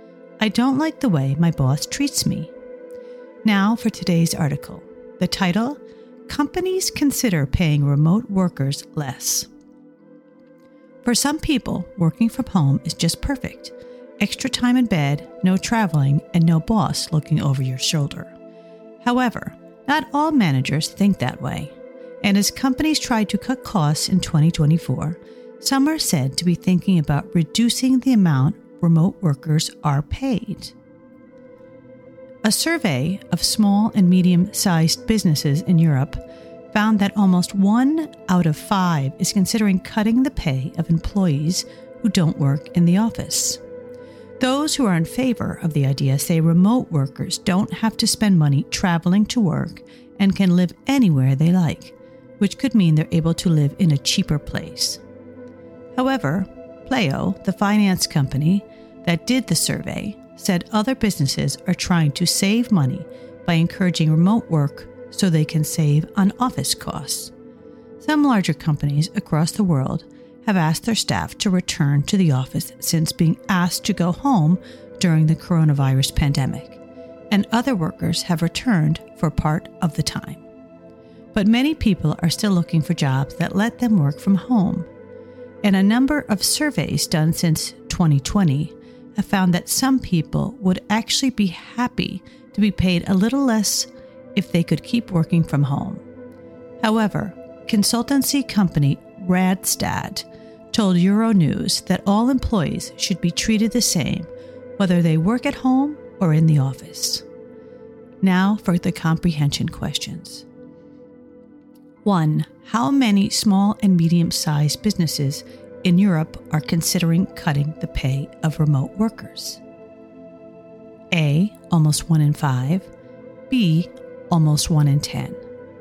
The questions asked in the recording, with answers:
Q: How many small and medium-sized businesses in Europe are considering cutting the pay of remote workers?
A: Answer. Almost 1 in 5.